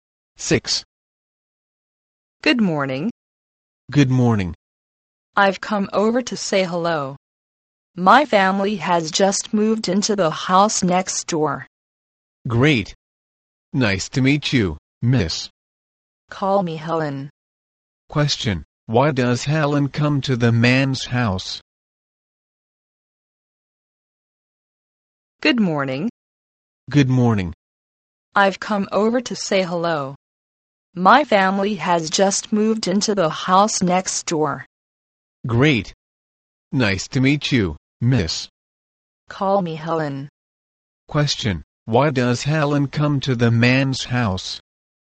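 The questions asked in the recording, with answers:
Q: Why does Helen come to the man's house?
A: To say hello, because her family just moved in next door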